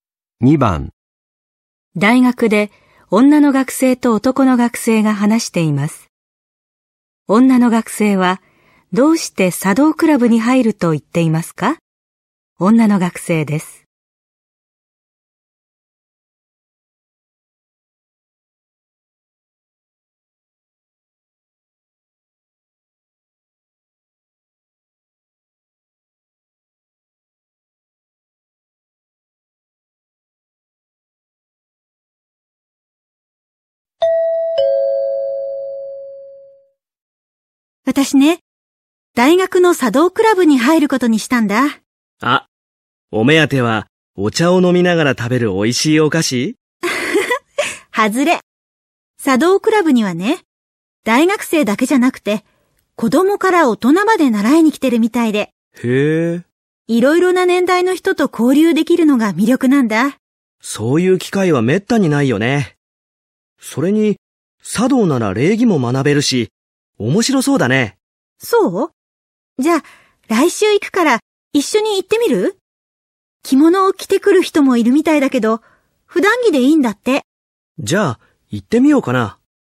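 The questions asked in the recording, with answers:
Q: 女の学生は、どうして茶道クラブに入ると言っていますか?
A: いろいろな年代の人と交流できるから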